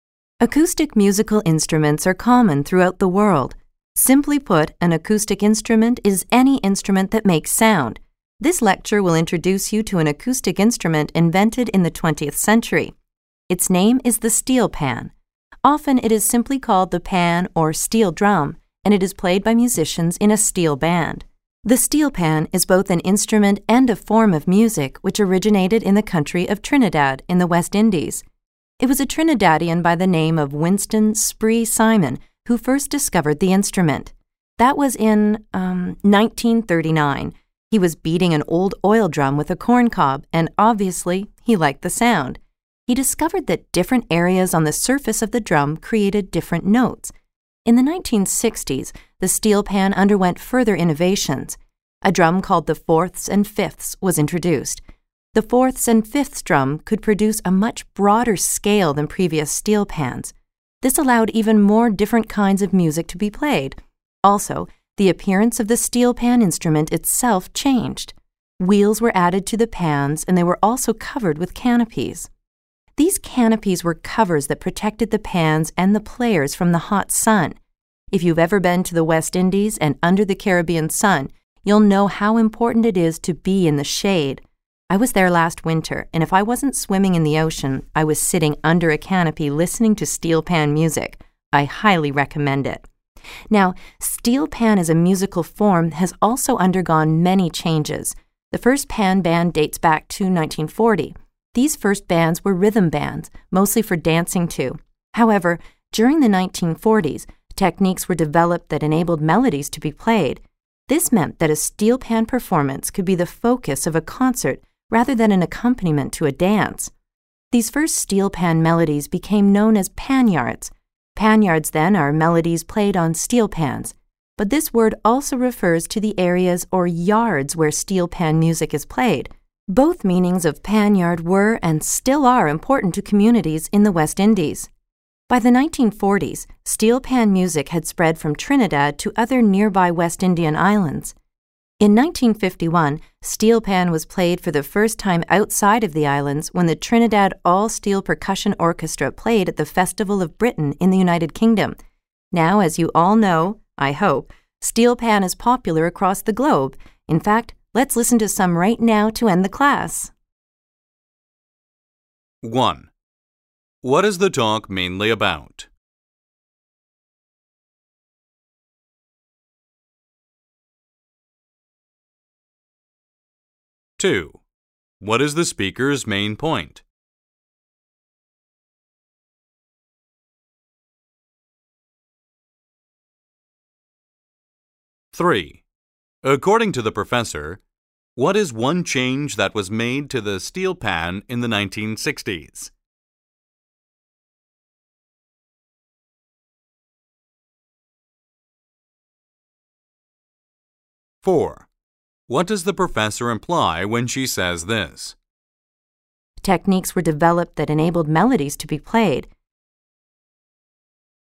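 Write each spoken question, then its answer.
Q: What is the talk mainly about?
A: The steel pan, an acoustic instrument and musical form from Trinidad, and its history

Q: According to the professor, what is one change that was made to the steel pan in the 1960s?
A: The fourths and fifths drum was introduced, which could play a broader scale (wheels and canopies were also added)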